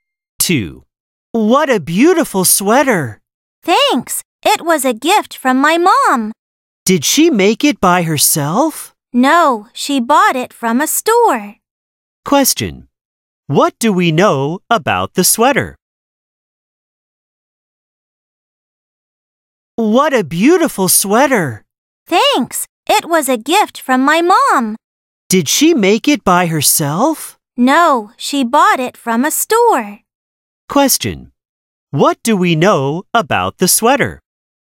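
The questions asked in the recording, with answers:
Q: What do we know about the sweater?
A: His mom bought it from a store as a gift.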